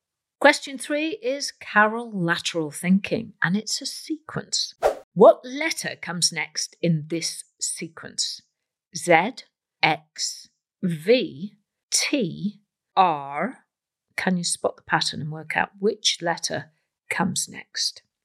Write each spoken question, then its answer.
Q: What letter comes next in this sequence?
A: And the next letter is P.